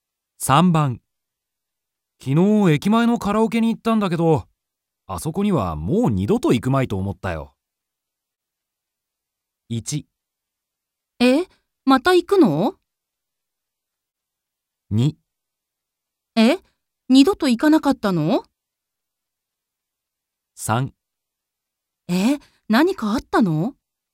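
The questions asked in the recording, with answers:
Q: 昨日駅前のカラオケに行ったんだけど、あそこにはもう二度と行くまいと思ったよ。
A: 3: え、何かあったの?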